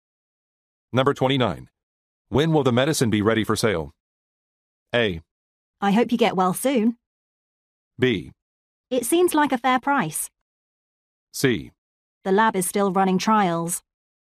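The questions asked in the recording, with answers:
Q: When will the medicine be ready for sale?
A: C: The lab is still running trials.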